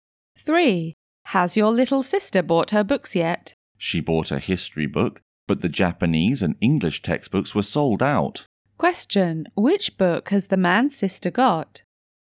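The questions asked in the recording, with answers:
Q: Which book has the man's sister got?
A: A history book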